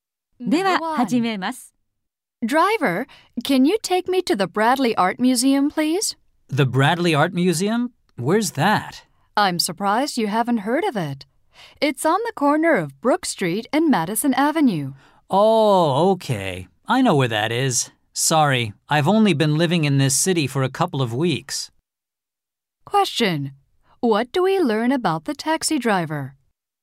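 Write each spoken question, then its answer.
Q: What do we learn about the taxi driver?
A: He has only been living in the city for a couple of weeks.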